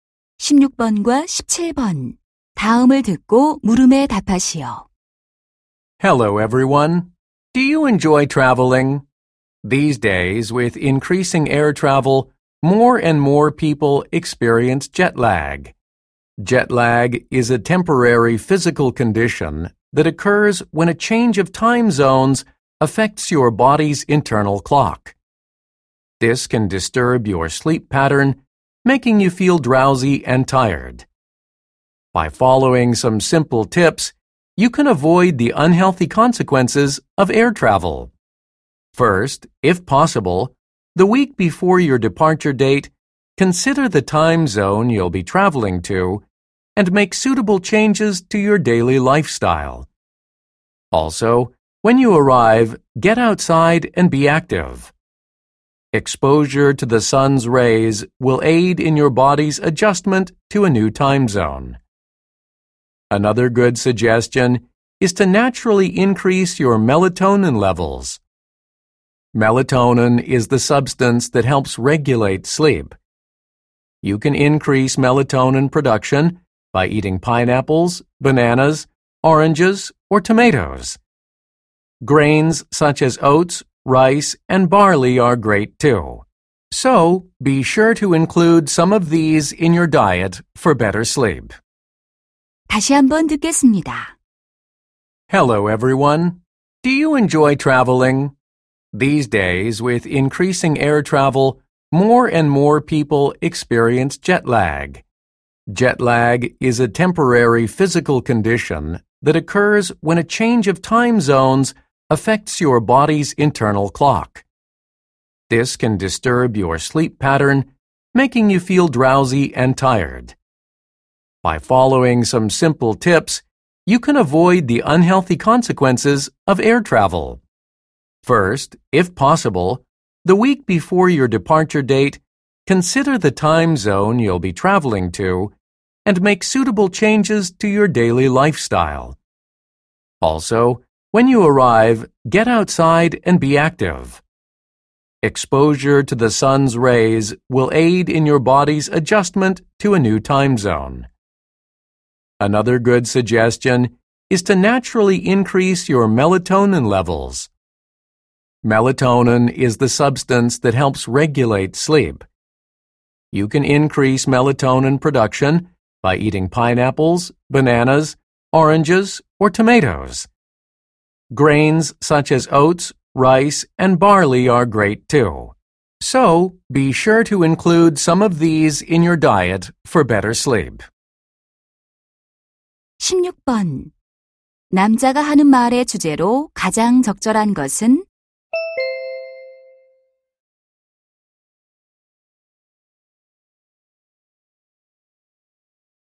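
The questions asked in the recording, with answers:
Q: 남자가 하는 말의 주제로 가장 적절한 것은?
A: 시차증을 피하는 방법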